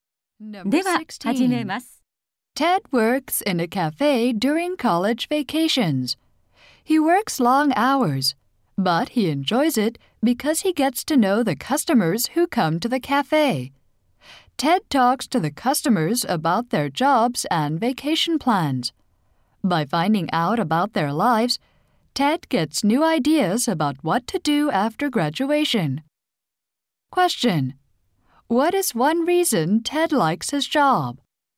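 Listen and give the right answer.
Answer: He gets to know the customers.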